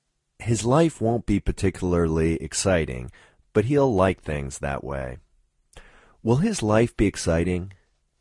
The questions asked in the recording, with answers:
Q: Will his life be exciting?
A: No, it won't be particularly exciting.